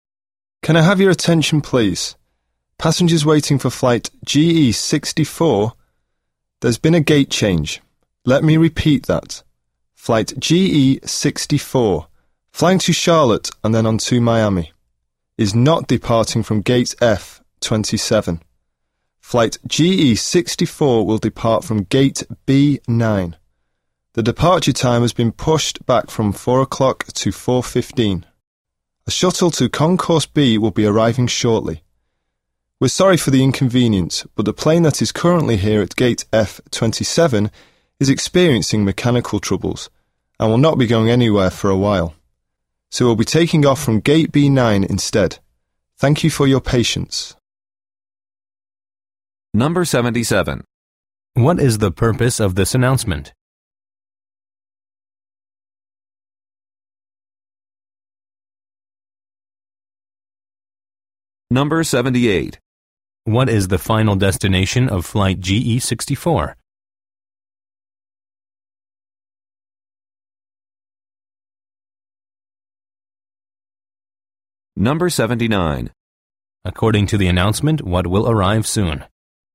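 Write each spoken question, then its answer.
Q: What is the purpose of this announcement?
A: To announce a gate change for flight GE64

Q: What is the final destination of flight GE64?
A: Miami

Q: According to the announcement, what will arrive soon?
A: A shuttle to Concourse B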